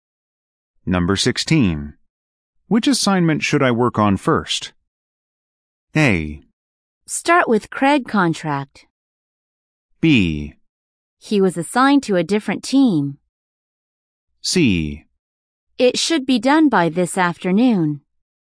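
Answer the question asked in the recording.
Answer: A: Start with Craig contract.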